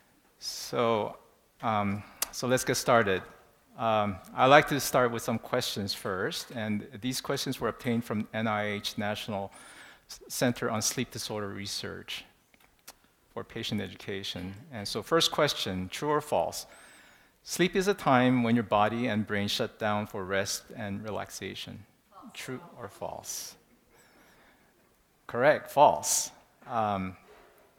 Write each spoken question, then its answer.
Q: Sleep is a time when your body and brain shut down for rest and relaxation.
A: Correct, false.